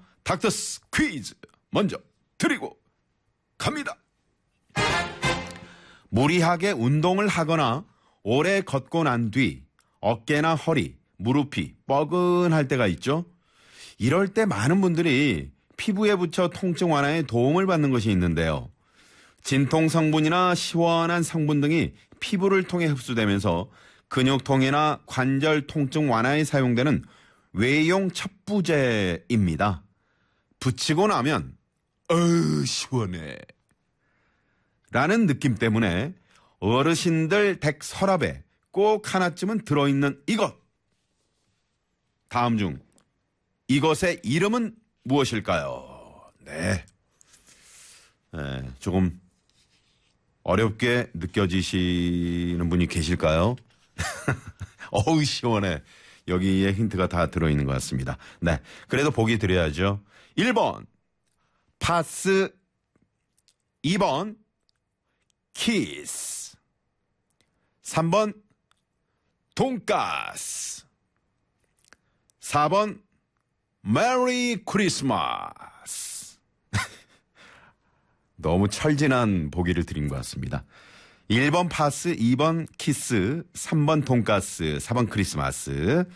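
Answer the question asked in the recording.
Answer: 1: 파스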